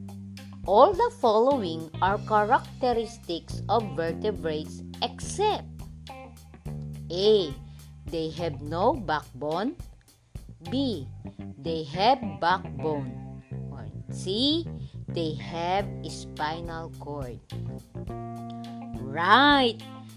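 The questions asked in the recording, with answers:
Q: All the following are characteristics of vertebrates except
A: A: They have no backbone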